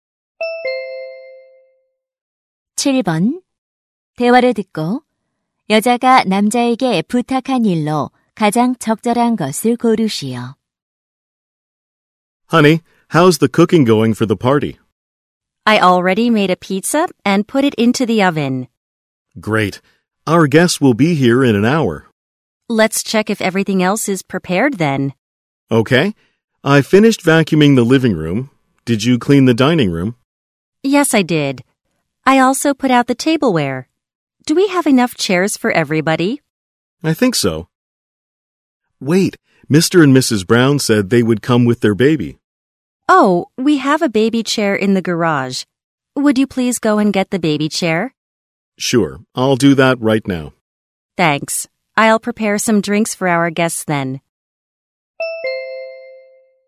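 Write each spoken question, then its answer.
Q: 대화를 듣고 여자가 남자에게 부탁한 일로 가장 적절한 것을 고르시오.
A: 차고에서 아기 의자 가져오기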